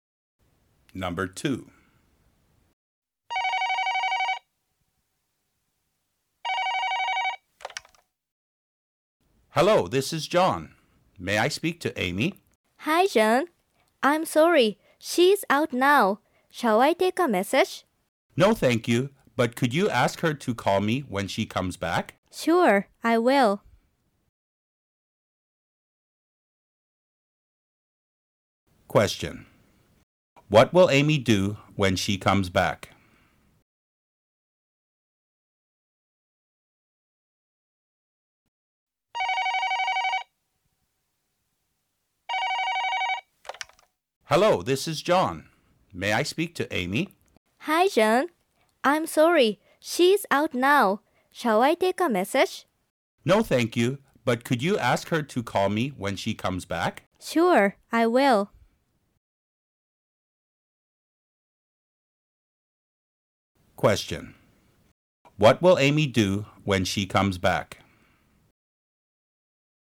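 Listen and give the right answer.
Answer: She will call John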